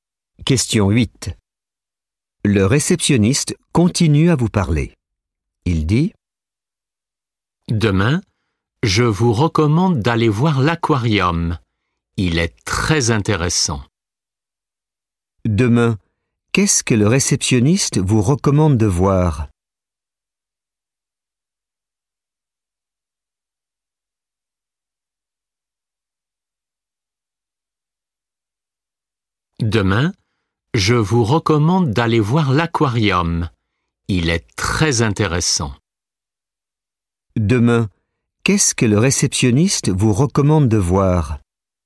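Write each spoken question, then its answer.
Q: Demain, qu'est-ce que le réceptionniste vous recommande de voir?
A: L'aquarium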